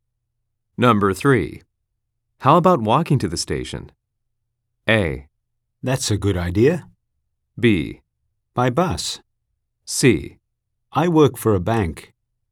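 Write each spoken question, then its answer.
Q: How about walking to the station?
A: A: That's a good idea.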